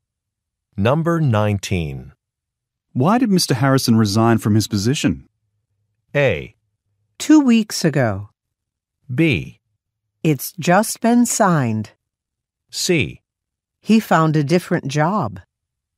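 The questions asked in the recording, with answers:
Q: Why did Mr. Harrison resign from his position?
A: C: He found a different job.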